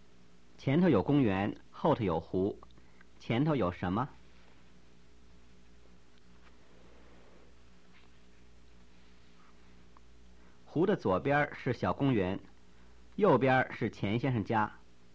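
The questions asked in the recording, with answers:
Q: 前头有什么?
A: 公园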